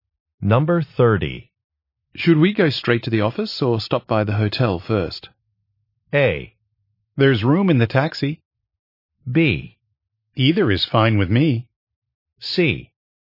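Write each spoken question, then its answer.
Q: Should we go straight to the office or stop by the hotel first?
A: B: Either is fine with me.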